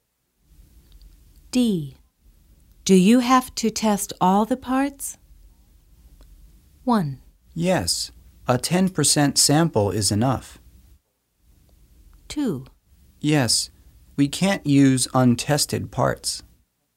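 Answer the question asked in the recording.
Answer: 2: Yes, we can't use untested parts.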